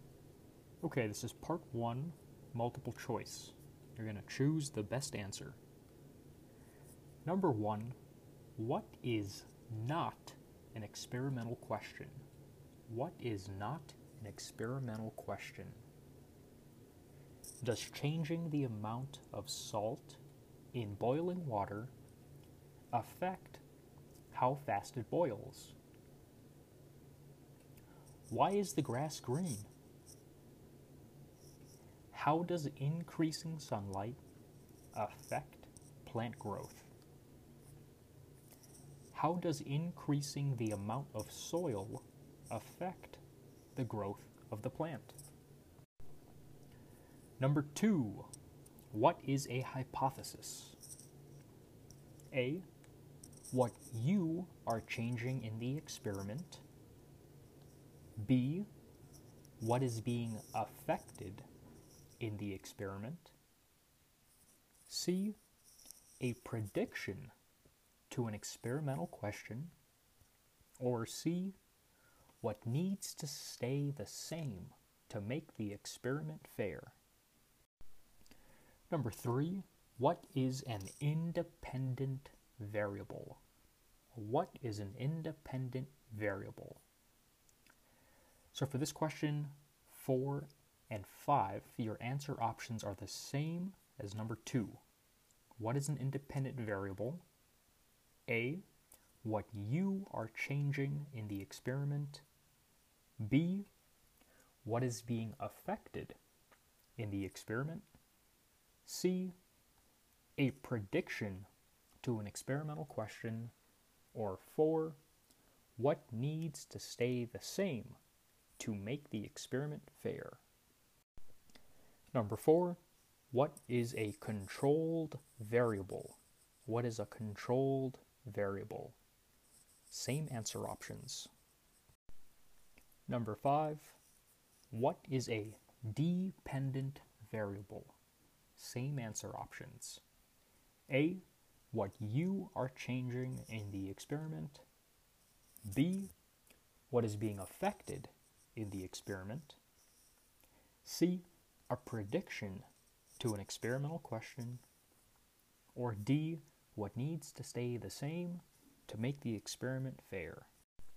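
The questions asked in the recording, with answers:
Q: what is not an experimental question?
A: Why is the grass green?

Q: what is a hypothesis?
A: C: a prediction to an experimental question

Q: what is an independent variable?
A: A: what you are changing in the experiment

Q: what is a controlled variable?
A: D: what needs to stay the same to make the experiment fair

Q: what is a dependent variable?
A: B: what is being affected in the experiment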